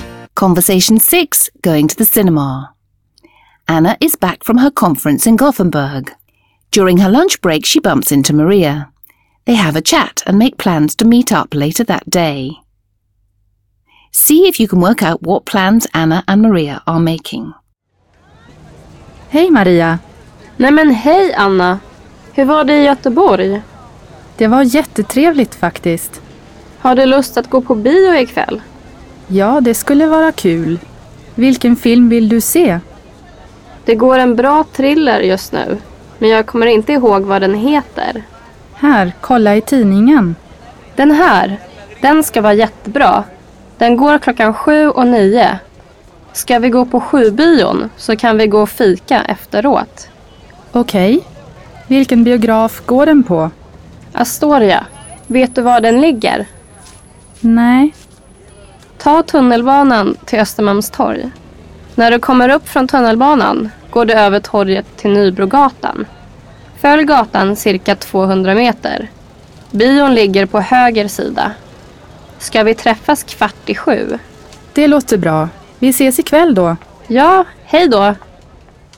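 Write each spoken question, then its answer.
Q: See if you can work out what plans Anna and Maria are making.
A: To see a thriller at the 7 o'clock showing at the Astoria cinema that evening (meeting at 7:15), then have coffee afterwards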